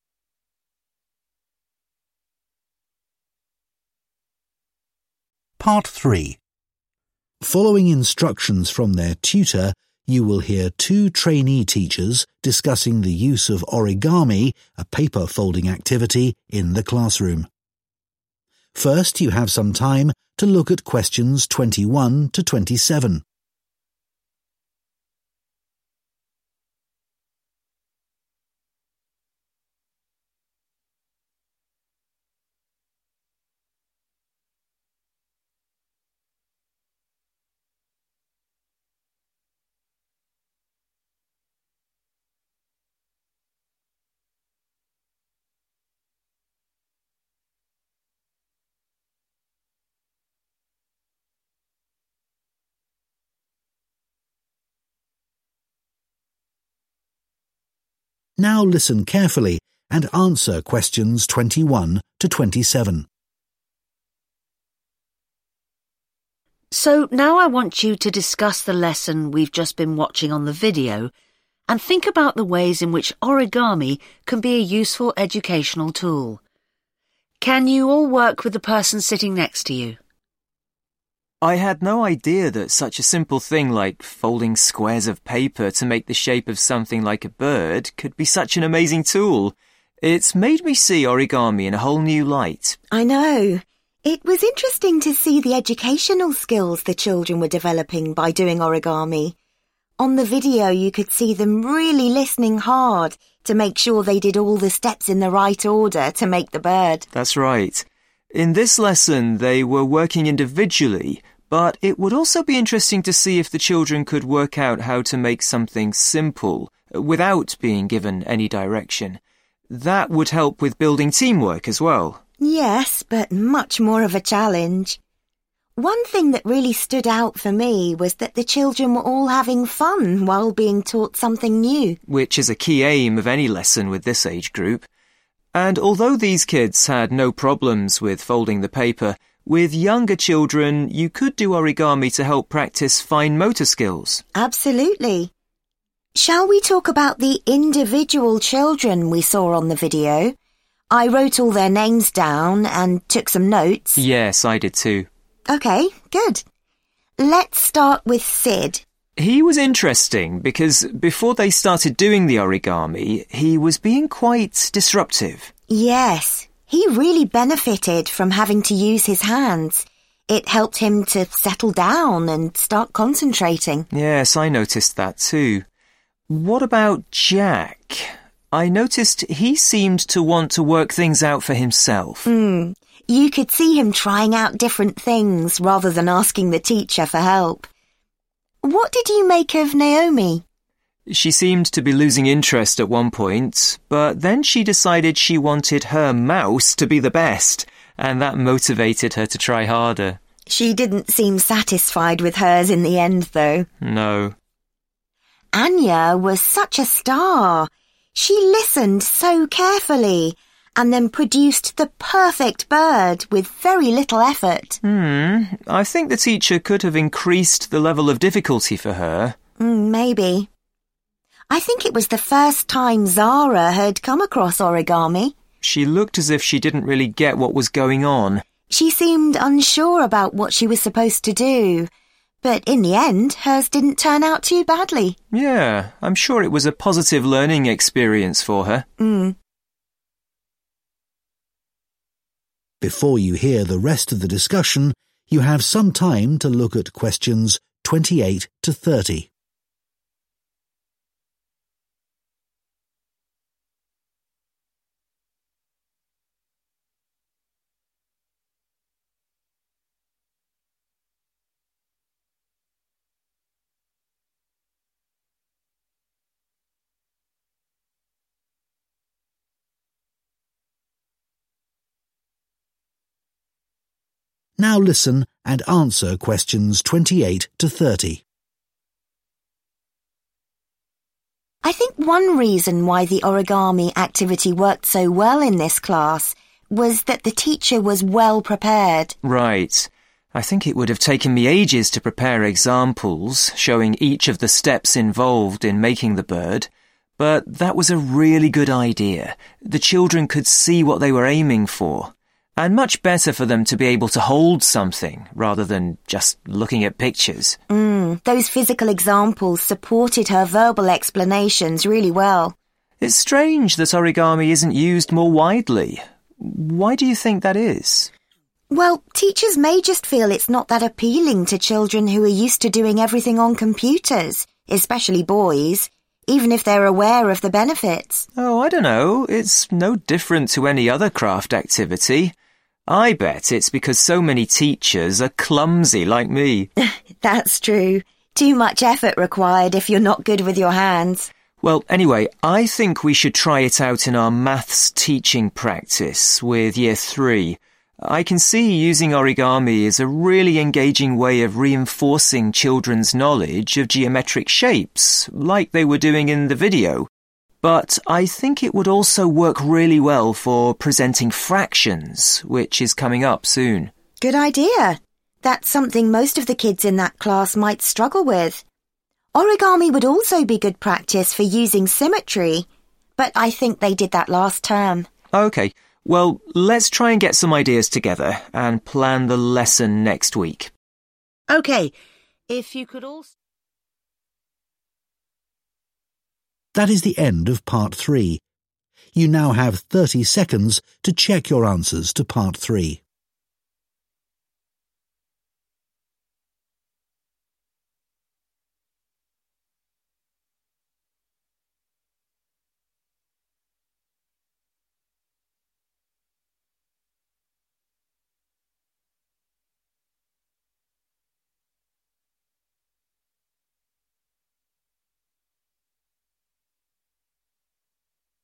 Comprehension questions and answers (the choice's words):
Choose TWO letters, A-E.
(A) demonstrated independence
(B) asked for teacher support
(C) developed a competitive attitude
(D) seemed to find the activity calming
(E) seemed pleased with the results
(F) seemed confused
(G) seemed to find the activity easy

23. Sid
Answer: seemed to find the activity calming

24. Jack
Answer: demonstrated independence

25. Naomi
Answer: developed a competitive attitude

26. Anya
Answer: seemed to find the activity easy

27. Zara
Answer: seemed confused

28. Before starting an origami activity in class, the students think it is important for the teacher to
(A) make models that demonstrate the different stages.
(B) check children understand the terminology involved.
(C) tell children not to worry if they find the activity difficult.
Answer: make models that demonstrate the different stages.

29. The students agree that some teachers might be unwilling to use origami in class because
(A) they may not think that crafts are important.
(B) they may not have the necessary skills.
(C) they may worry that it will take up too much time.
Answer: they may not have the necessary skills.

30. Why do the students decide to use origami in their maths teaching practice?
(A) to correct a particular misunderstanding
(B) to set a challenge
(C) to introduce a new concept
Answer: to introduce a new concept